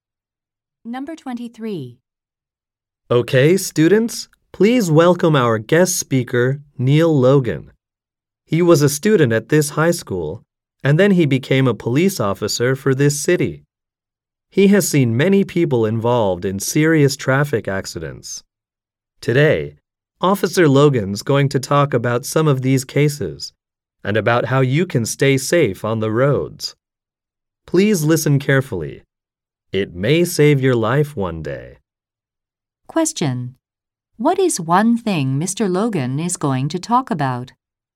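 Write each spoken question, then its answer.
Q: What is one thing Mr. Logan is going to talk about?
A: Traffic accidents and how to stay safe on the roads.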